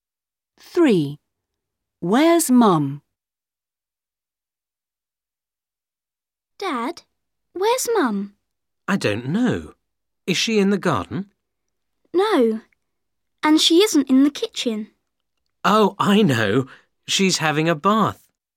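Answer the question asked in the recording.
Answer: in the bath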